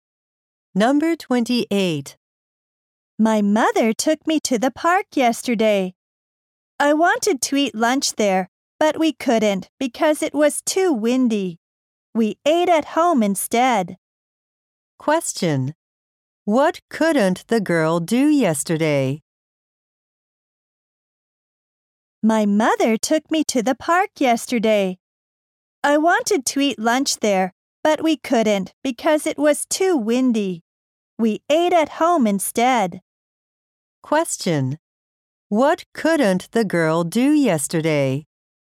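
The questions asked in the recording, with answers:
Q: What couldn't the girl do yesterday?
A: Eat lunch at the park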